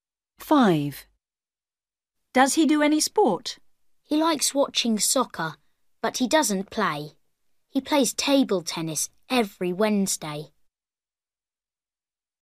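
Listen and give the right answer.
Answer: Yes, he plays table tennis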